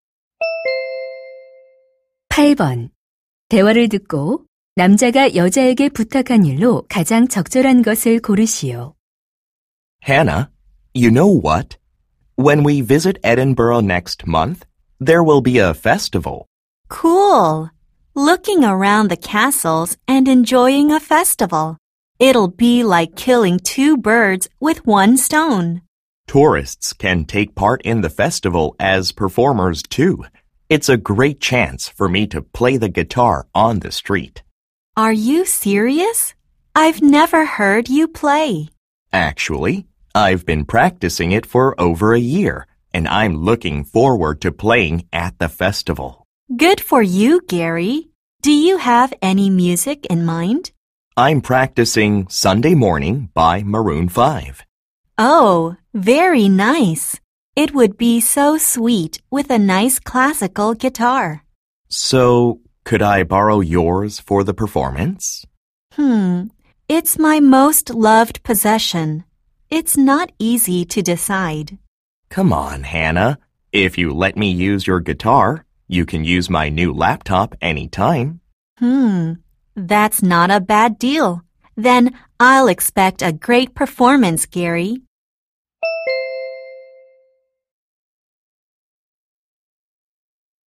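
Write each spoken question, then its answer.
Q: 대화를 듣고 남자가 여자에게 부탁한 일로 가장 적절한 것을 고르시오.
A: 기타 빌려주기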